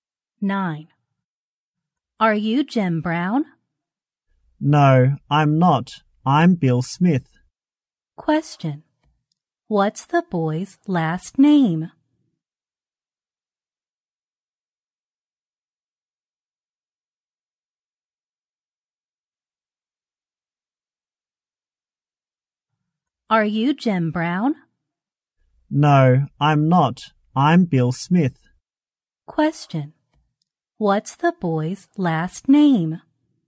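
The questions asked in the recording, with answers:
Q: What's the boy's last name?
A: Smith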